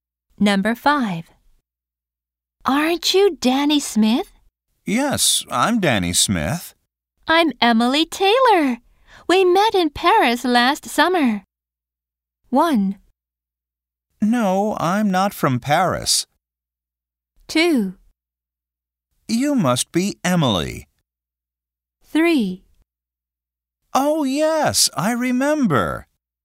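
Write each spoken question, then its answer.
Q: I'm Emily Taylor. We met in Paris last summer.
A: 3: Oh, yes, I remember.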